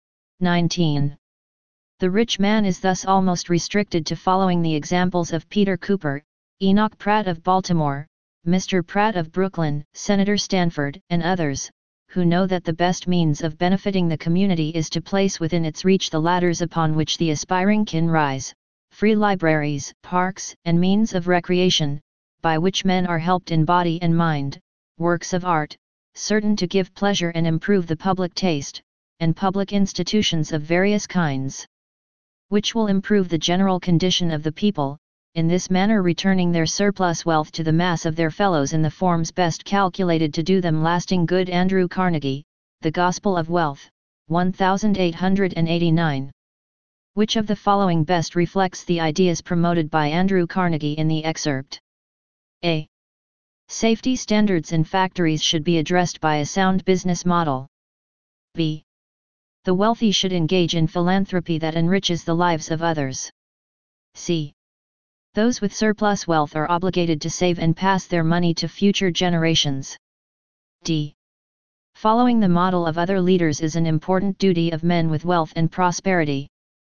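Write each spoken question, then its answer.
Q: Which of the following best reflects the ideas promoted by Andrew Carnegie in the excerpt?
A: B: The wealthy should engage in philanthropy that enriches the lives of others.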